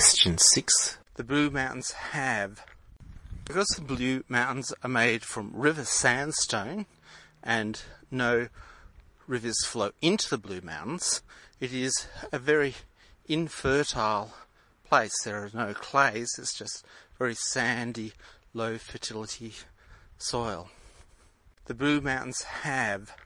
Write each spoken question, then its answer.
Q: The Blue Mountains have...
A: C. Infertile sandy soil.